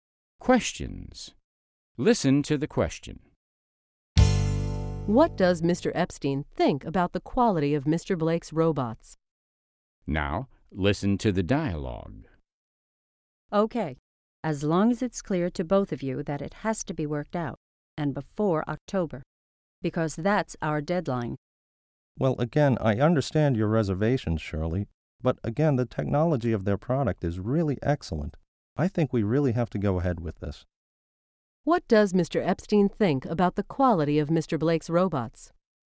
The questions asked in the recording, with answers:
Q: What does Mr. Epstein think about the quality of Mr. Blake's robots?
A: He thinks the technology of their product is excellent.